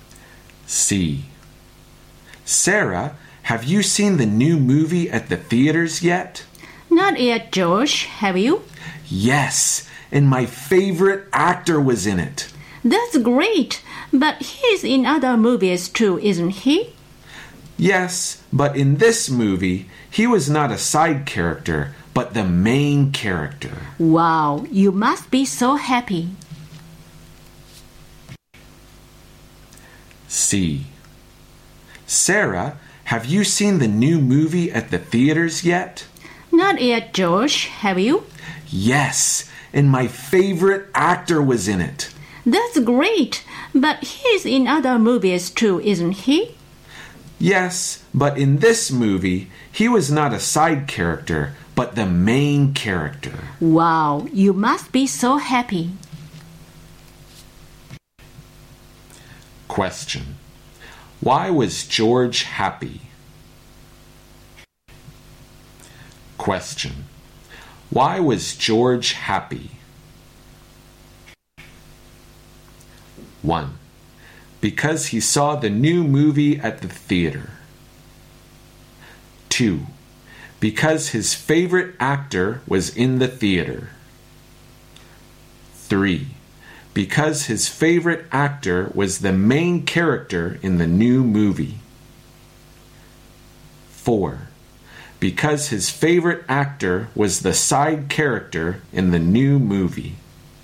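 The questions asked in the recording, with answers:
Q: Why was George happy?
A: 3: Because his favorite actor was the main character in the new movie.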